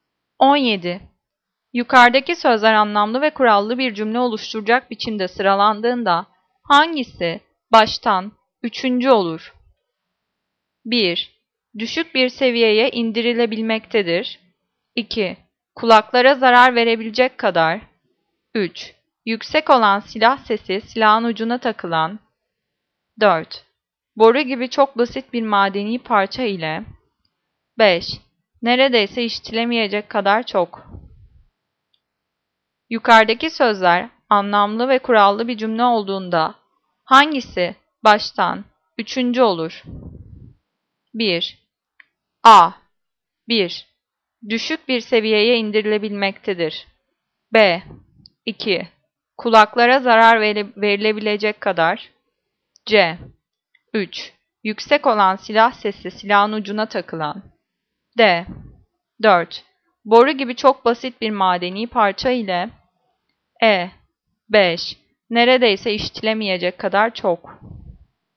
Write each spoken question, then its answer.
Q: Yukarıdaki sözler anlamlı ve kurallı bir cümle oluşturacak biçimde sıralandığında hangisi baştan üçüncü olur?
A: Cevap D. 4. Boru gibi çok basit bir madeni parça ile.